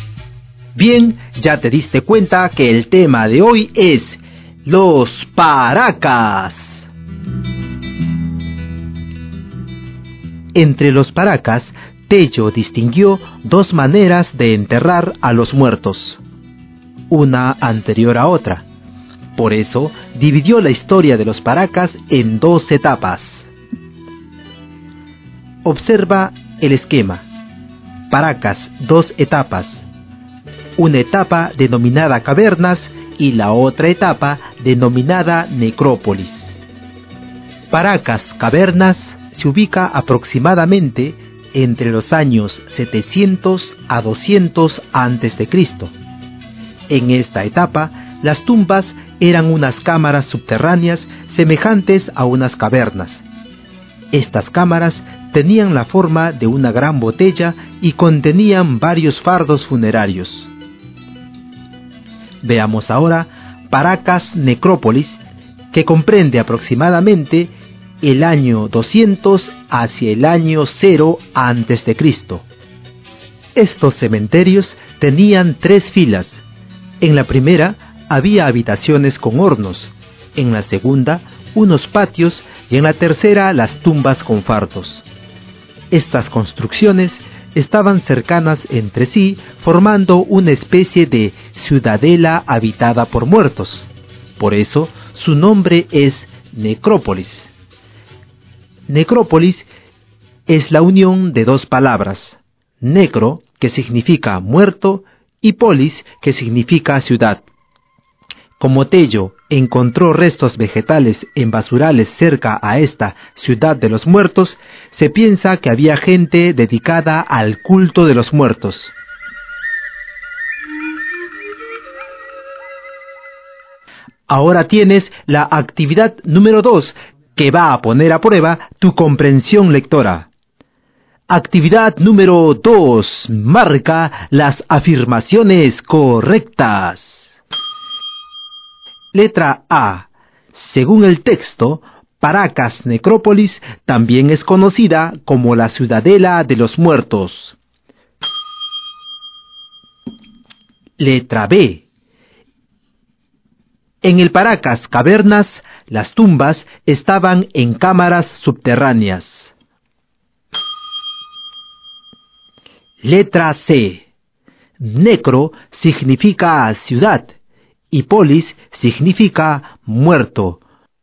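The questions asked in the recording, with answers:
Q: Según el texto, Paracas Necrópolis también es conocida como la ciudadela de los muertos.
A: Verdadero

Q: En el Paracas Cavernas, las tumbas estaban en cámaras subterráneas.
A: Verdadero

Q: Necro significa ciudad y polis significa muerto.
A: Falso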